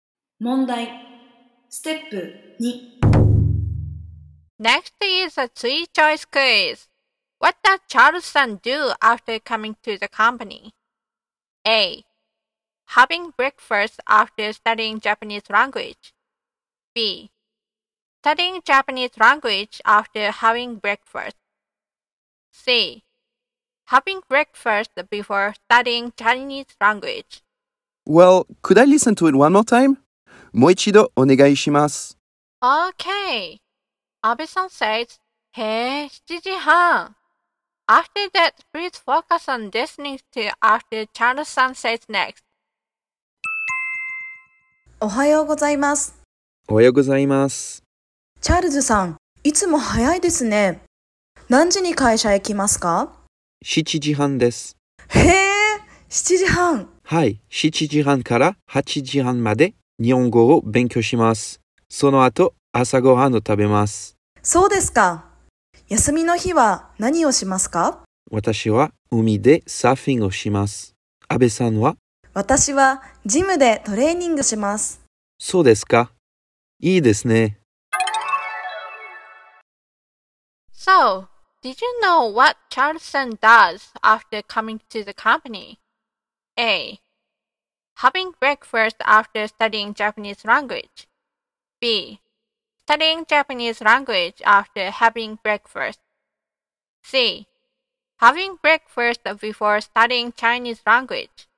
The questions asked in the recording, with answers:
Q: What does Charles do after coming to the company?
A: Then the answer is a. Having breakfast after studying Japanese language.